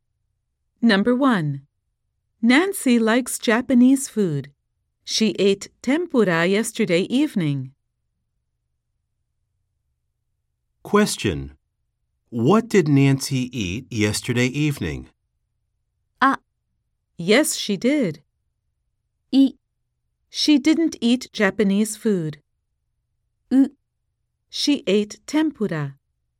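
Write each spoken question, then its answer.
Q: What did Nancy eat yesterday evening?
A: C: She ate tempura.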